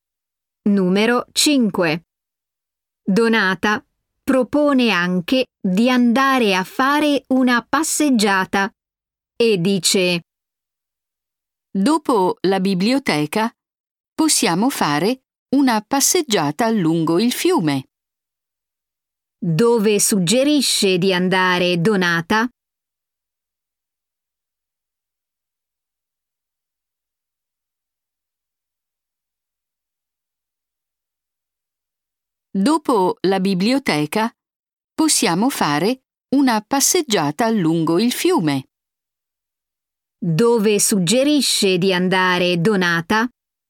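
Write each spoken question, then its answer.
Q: Dove suggerisce di andare Donata?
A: a fare una passeggiata lungo il fiume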